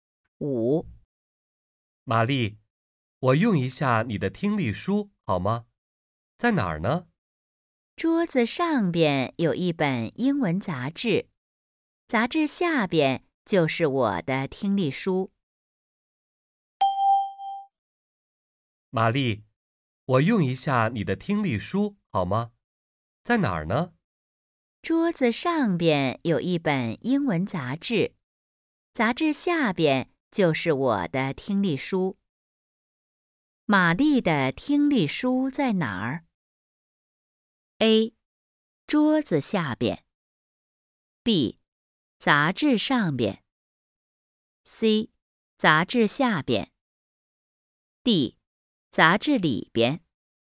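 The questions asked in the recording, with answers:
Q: 玛丽的听力书在哪儿?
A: C: 杂志下边。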